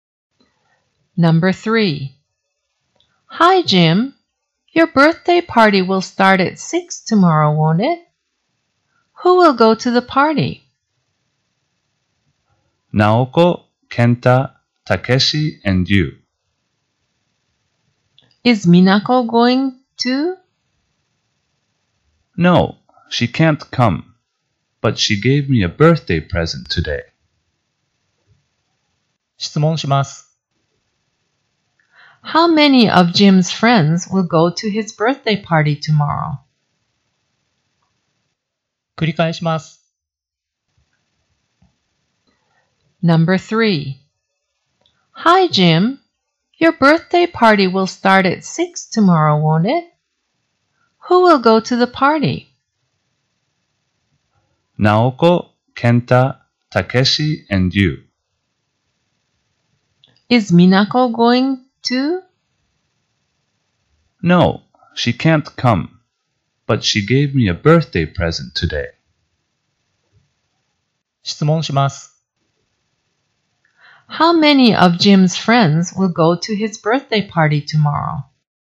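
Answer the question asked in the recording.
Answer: Four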